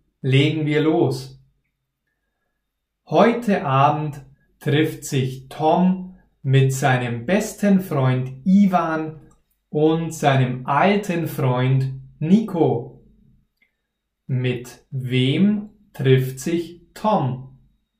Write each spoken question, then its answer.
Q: Mit wem trifft sich Tom?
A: Mit seinem besten Freund Ivan und seinem alten Freund Nico.